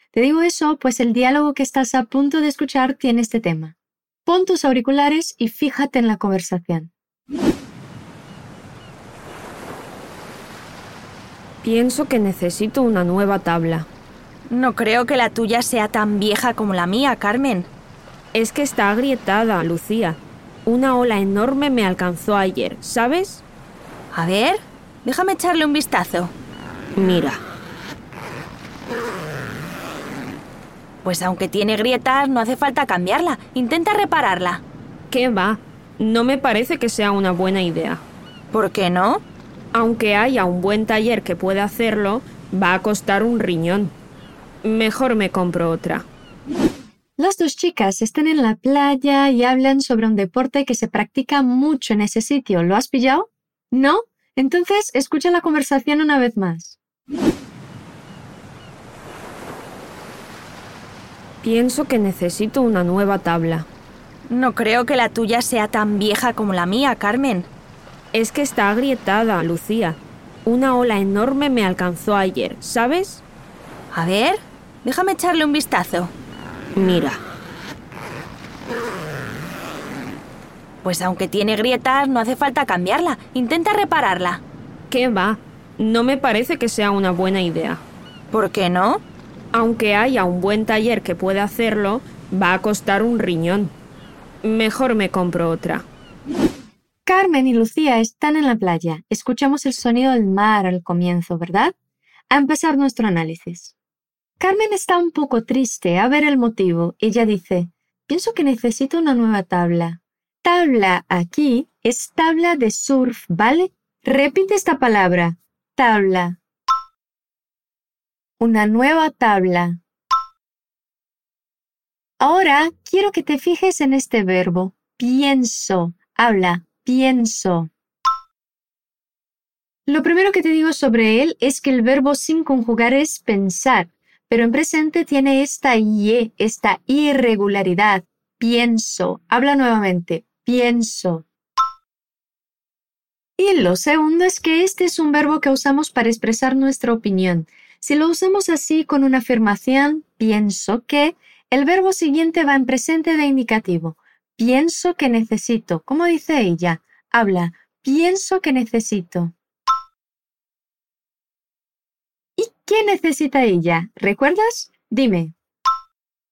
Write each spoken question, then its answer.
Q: ¿Y qué necesita ella? ¿Recuerdas?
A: Una nueva tabla.